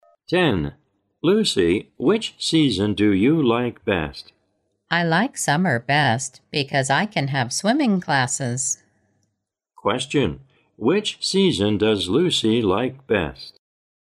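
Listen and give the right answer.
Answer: Summer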